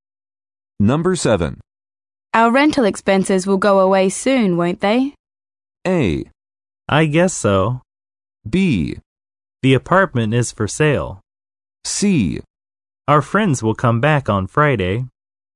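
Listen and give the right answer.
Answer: A: I guess so.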